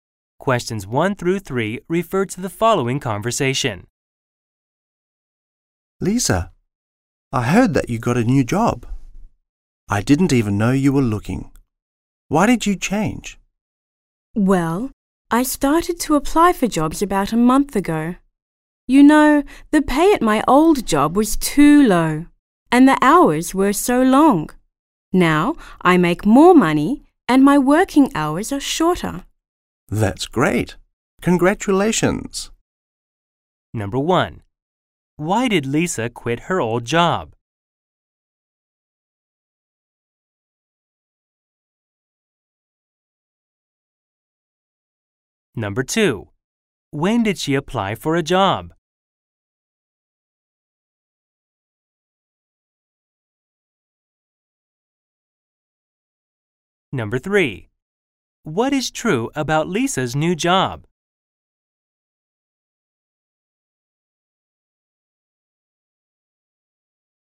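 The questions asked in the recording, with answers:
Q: Why did Lisa quit her old job?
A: The pay was too low and the hours were too long

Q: When did she apply for a job?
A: About a month ago

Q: What is true about Lisa's new job?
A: She makes more money and works shorter hours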